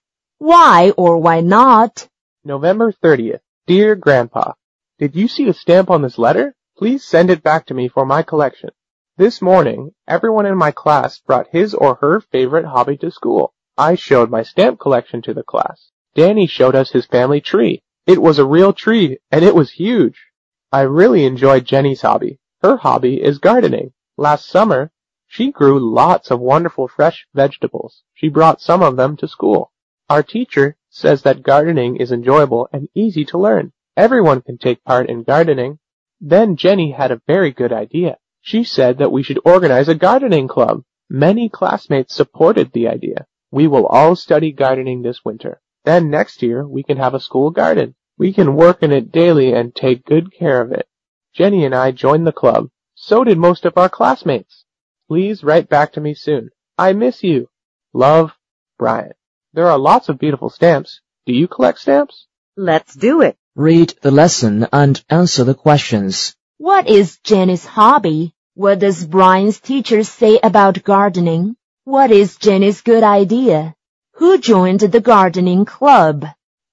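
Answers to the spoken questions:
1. Gardening
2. It is enjoyable and easy to learn, and everyone can take part.
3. To organize a gardening club
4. Jenny, Brian and most of their classmates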